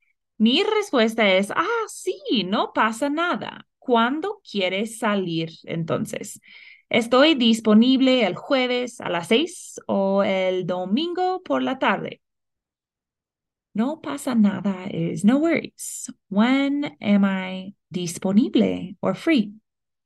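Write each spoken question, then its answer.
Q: When am I disponible or free?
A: Thursday at six or Sunday afternoon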